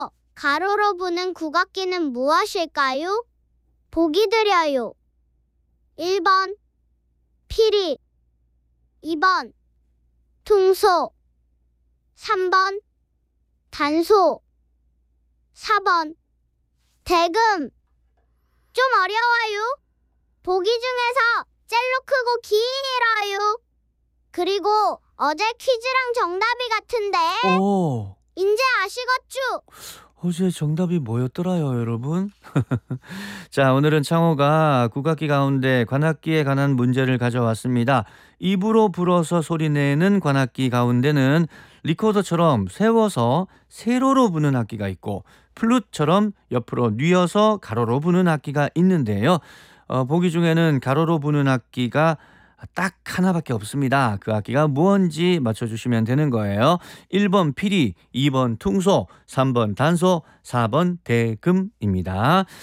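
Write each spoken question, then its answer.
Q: 가로로 부는 국악기는 무엇일까요?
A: 4번: 대금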